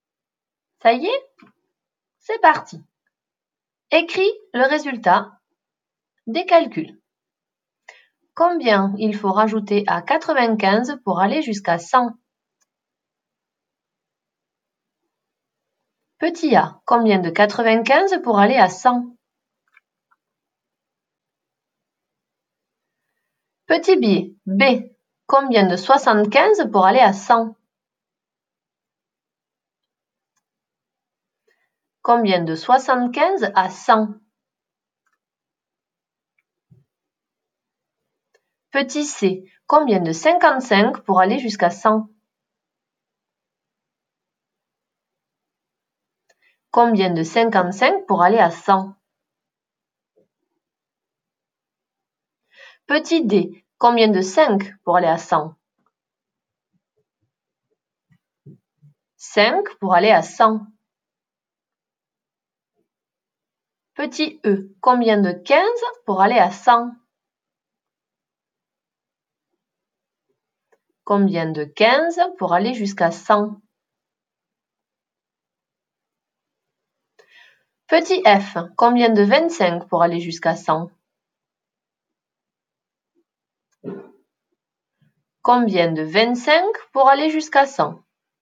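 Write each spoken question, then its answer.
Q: Petit b, combien de 75 pour aller à 100?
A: 25

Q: Petit c, combien de 55 pour aller jusqu'à 100?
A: 45

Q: Petit d, combien de 5 pour aller à 100?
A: 95

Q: Petit e, combien de 15 pour aller à 100?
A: 85

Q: Petit f, combien de 25 pour aller jusqu'à 100?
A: 75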